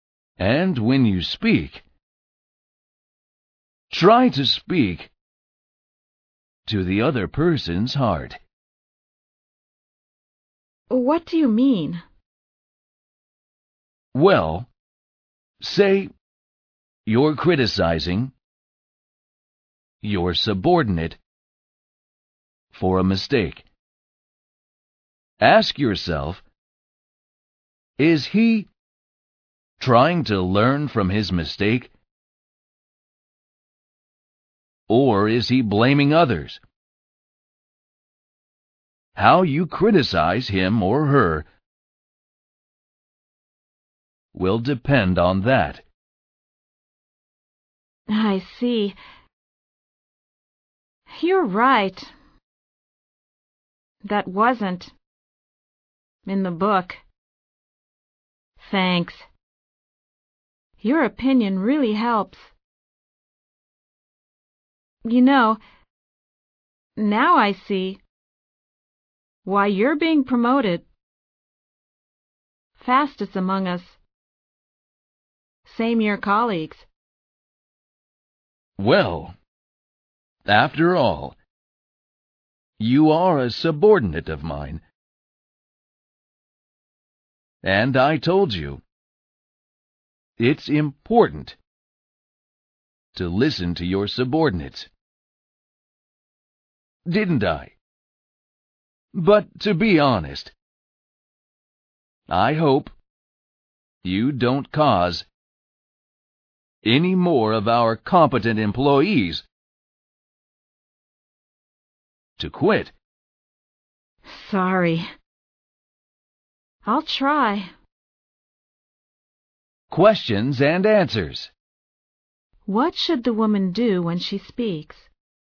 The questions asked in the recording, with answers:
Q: What should the woman do when she speaks?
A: Try to speak to the other person's heart.